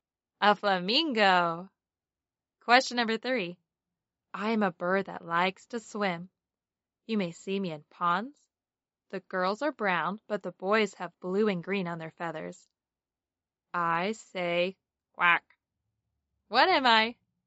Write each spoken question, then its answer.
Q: What am I?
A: Duck.